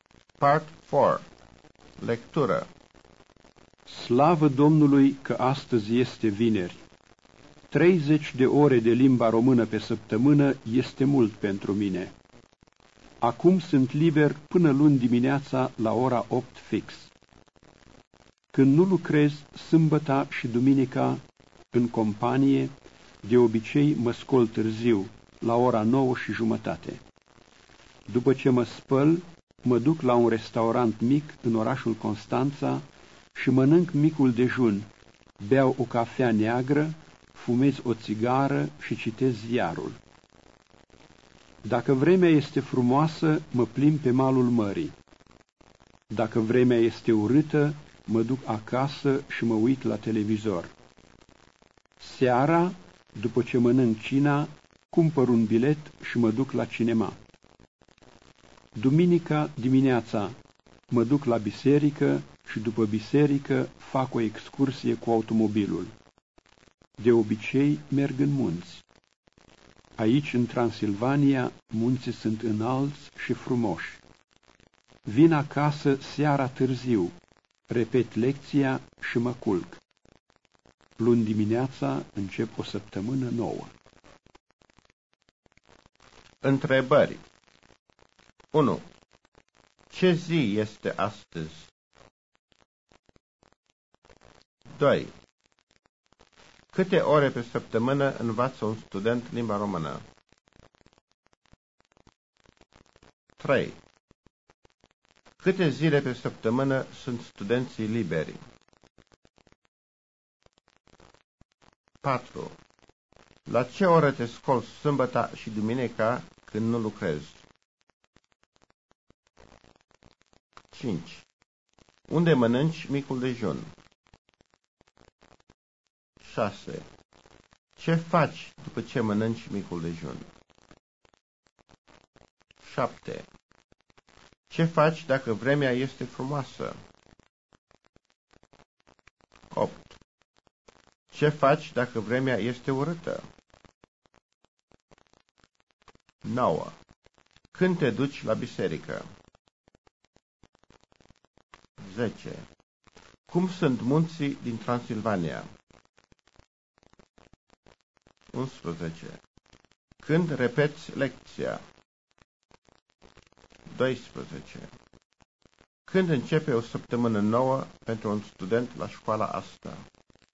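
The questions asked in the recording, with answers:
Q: Ce zi este astăzi?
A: Vineri.

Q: Câte ore pe săptămână învață un student limba română?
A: 30 de ore.

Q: Câte zile pe săptămână sunt studenții liberi?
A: Două zile (sâmbăta și duminica).

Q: La ce oră te scoli sâmbăta și duminica când nu lucrezi?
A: La ora 9:30.

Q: Unde mănânci micul dejun?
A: La un restaurant mic în orașul Constanța.

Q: Ce faci după ce mănânci micul dejun?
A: Beau o cafea neagră, fumez o țigară și citesc ziarul.

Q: Ce faci dacă vremea este frumoasă?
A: Mă plimb pe malul mării.

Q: Ce faci dacă vremea este urâtă?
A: Mă duc acasă și mă uit la televizor.

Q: Când te duci la biserică?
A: Duminica dimineața.

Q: Cum sunt munții din Transilvania?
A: Înalți și frumoși.

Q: Când repeți lecția?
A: Seara târziu, când vin acasă.

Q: Când începe o săptămână nouă pentru un student la școala asta?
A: Luni dimineața (la ora 8).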